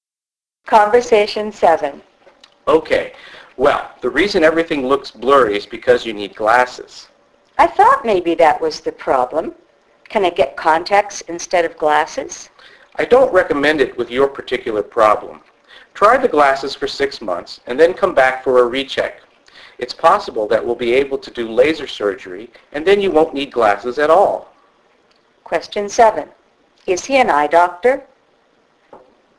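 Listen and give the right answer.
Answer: Yes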